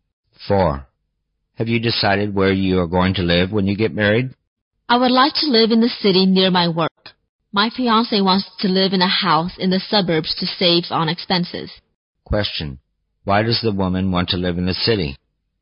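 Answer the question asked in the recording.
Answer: To be near her work.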